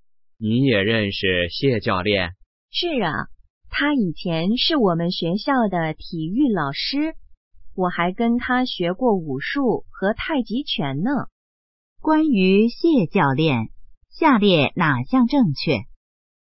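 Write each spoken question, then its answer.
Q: 关于谢教练,下列哪项正确?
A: 他以前是学校的体育老师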